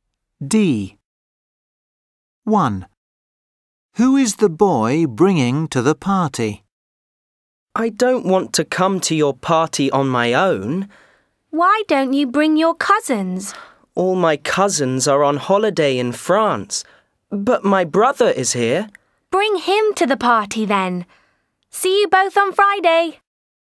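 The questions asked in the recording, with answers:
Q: Who is the boy bringing to the party?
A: his brother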